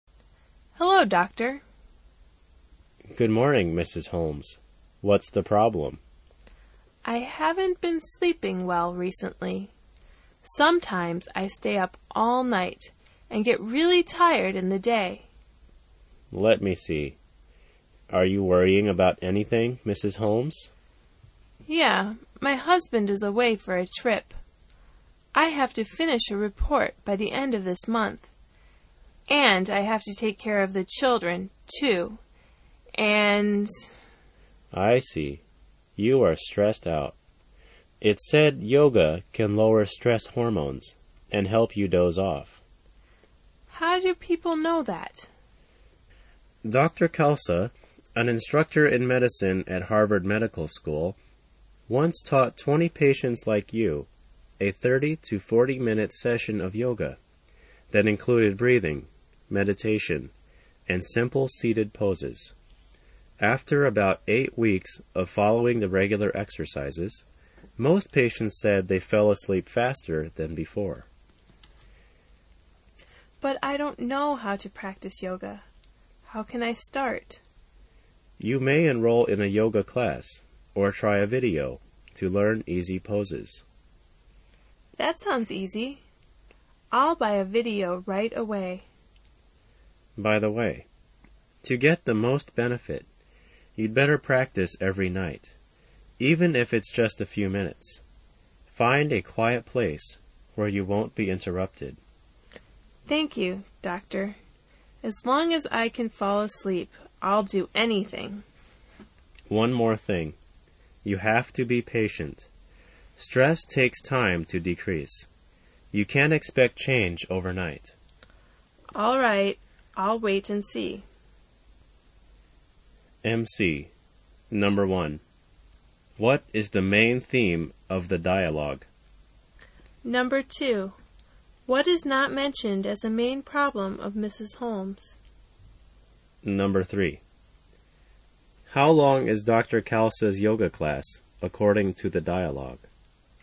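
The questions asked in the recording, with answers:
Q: What is the main theme of the dialogue?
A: Using yoga to reduce stress and help with sleep problems

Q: How long is Dr. Khalsa's yoga class, according to the dialogue?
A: 30 to 40 minutes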